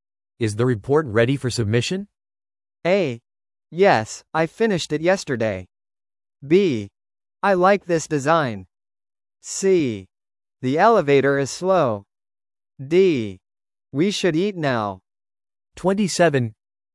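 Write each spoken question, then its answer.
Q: Is the report ready for submission?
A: A: Yes, I finished it yesterday.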